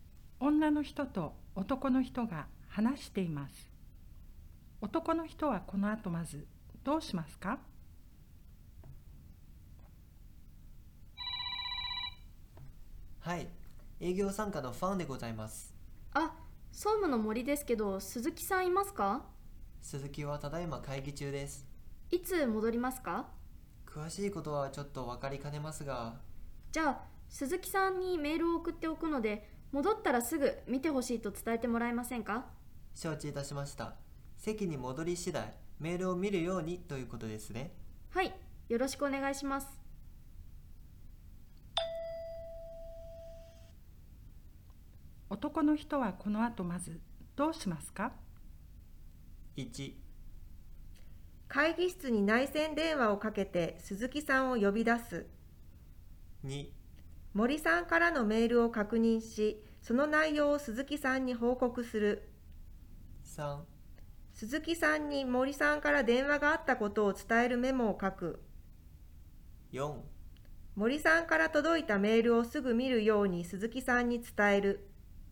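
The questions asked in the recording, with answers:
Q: 男の人はこの後まずどうしますか?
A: 4: 森さんから届いたメールをすぐ見るように鈴木さんに伝える。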